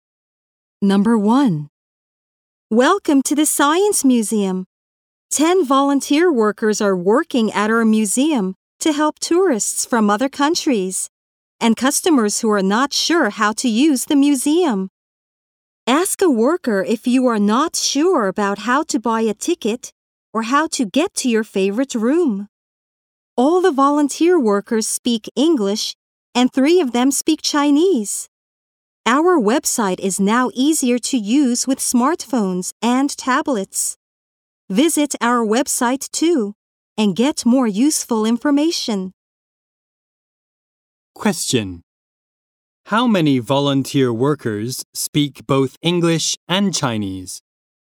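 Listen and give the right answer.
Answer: Three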